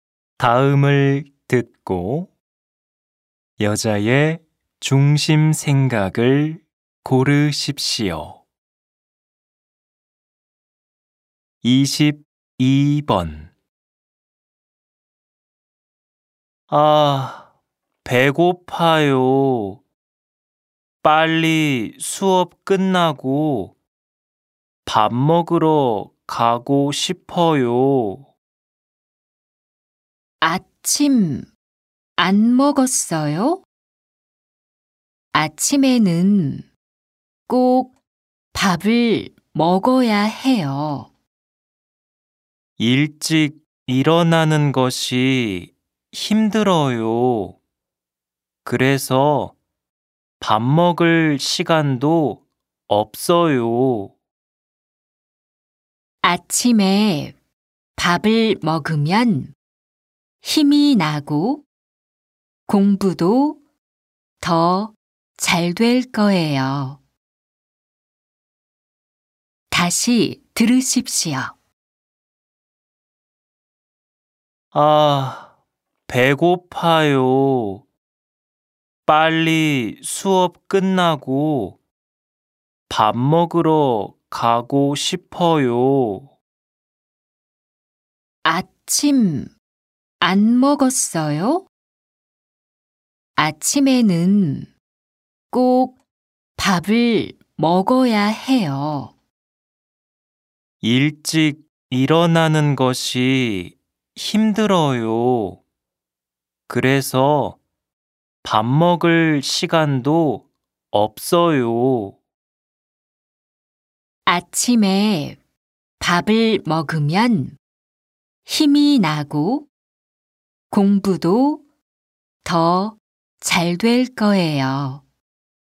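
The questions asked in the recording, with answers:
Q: 다음을 듣고 여자의 중심 생각을 고르십시오.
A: 아침에는 꼭 밥을 먹어야 한다.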